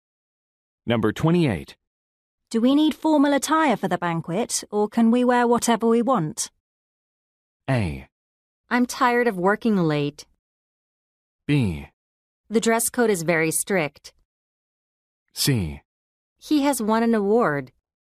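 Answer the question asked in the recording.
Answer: B: The dress code is very strict.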